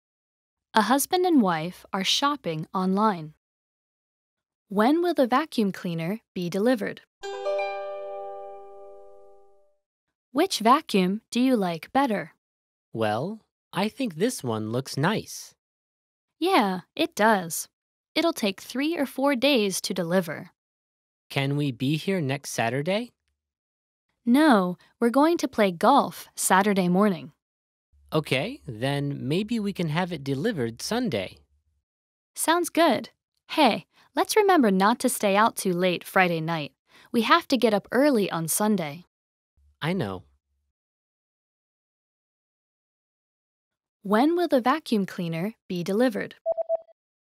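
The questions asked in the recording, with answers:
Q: When will the vacuum cleaner be delivered?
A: Sunday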